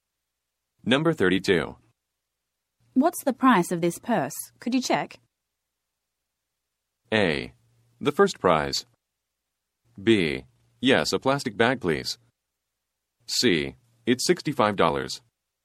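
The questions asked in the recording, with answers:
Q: What's the price of this purse?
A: C: It's $65.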